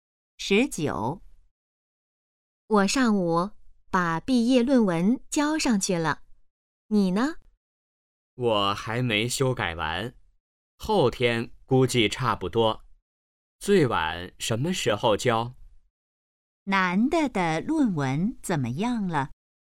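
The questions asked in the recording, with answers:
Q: 男的的论文怎么样了?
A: 还没修改完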